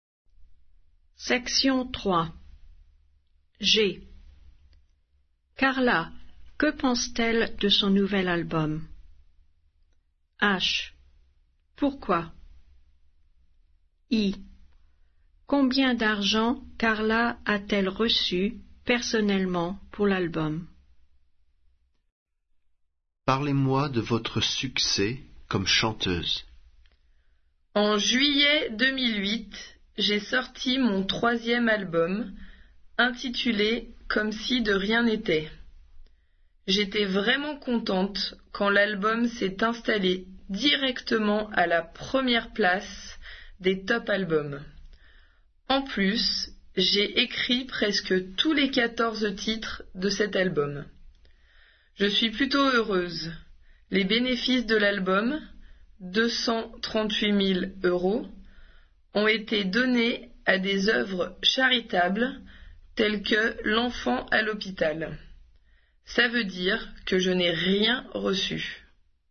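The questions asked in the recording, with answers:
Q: Carla, que pense-t-elle de son nouvel album?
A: Elle est contente

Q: Pourquoi?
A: L'album est arrivé à la première place des top albums et elle a écrit presque tous les titres

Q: Combien d'argent Carla a-t-elle reçu personnellement pour l'album?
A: Rien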